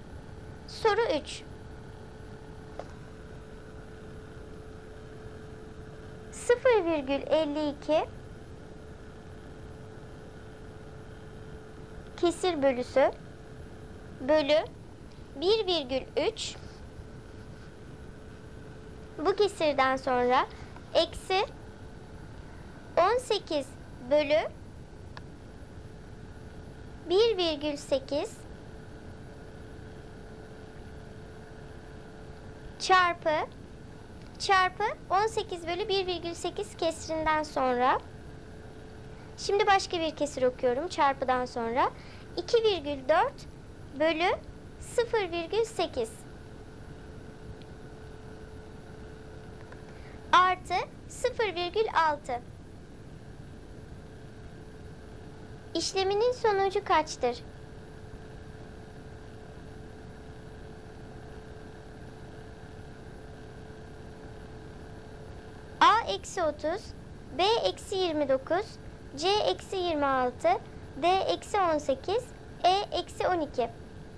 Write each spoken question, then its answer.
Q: İşleminin sonucu kaçtır?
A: Doğru cevap B eksi 29.